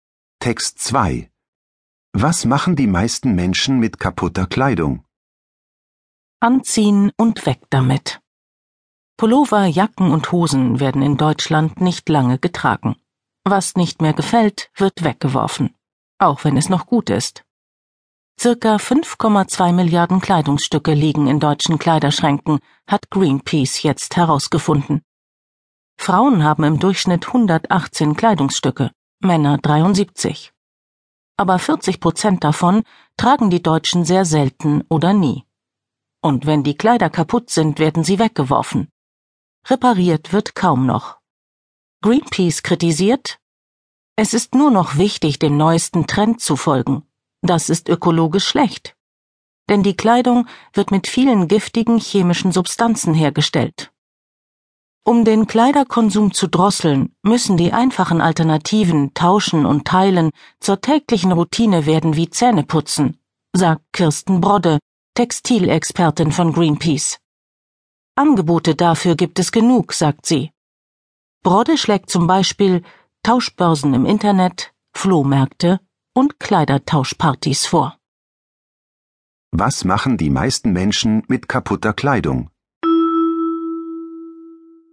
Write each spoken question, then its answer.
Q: Was machen die meisten Menschen mit kaputter Kleidung?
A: Sie werfen sie weg.